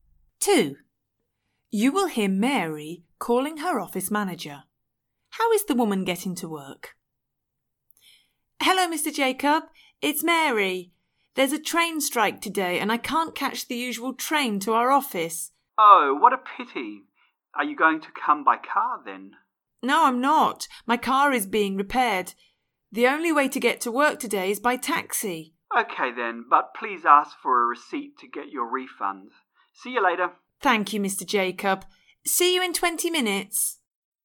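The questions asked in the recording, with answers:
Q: How is the woman getting to work?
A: By taxi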